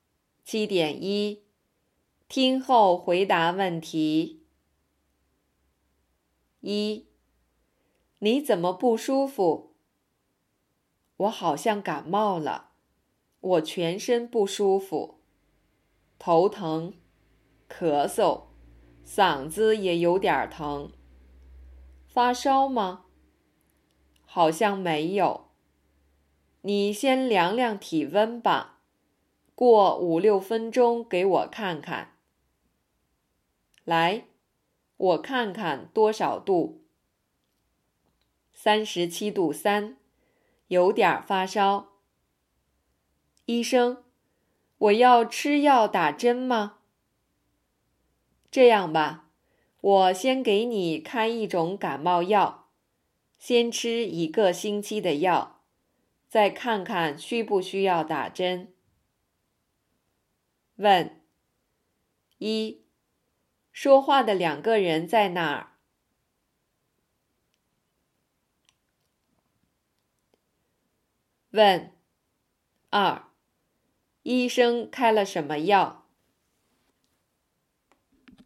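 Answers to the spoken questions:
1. 在医院
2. 感冒药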